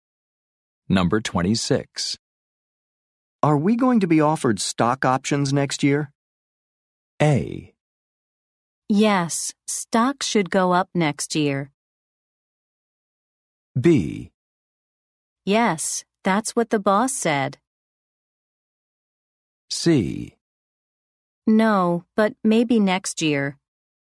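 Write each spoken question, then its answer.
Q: Are we going to be offered stock options next year?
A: B: Yes, that's what the boss said.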